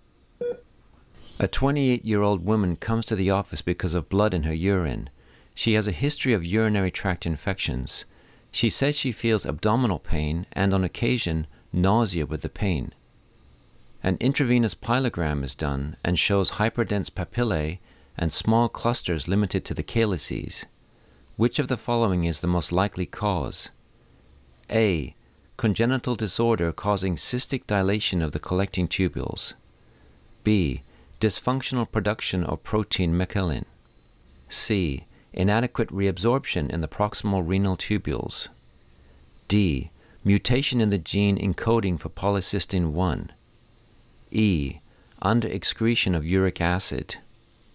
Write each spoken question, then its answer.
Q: Which of the following is the most likely cause?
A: And the answer is A. Congenital disorder causing cystic dilation in the collecting tubules.